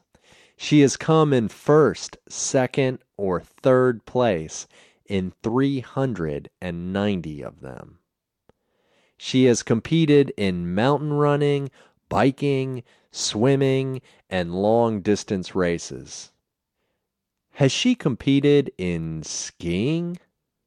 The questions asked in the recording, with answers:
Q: Has she competed in skiing?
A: No. She hasn't competed in skiing.